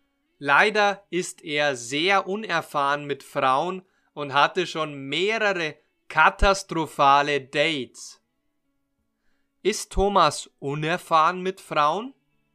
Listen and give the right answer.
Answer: Ja, Thomas ist sehr unerfahren mit Frauen.